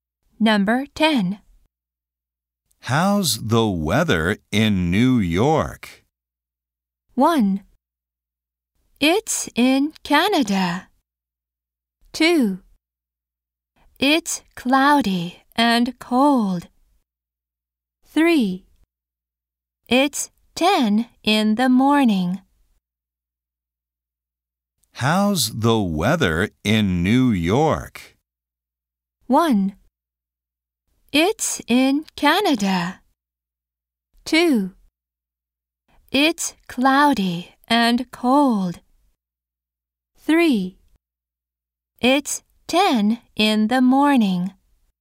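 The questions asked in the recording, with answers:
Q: How's the weather in New York?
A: 2: It's cloudy and cold.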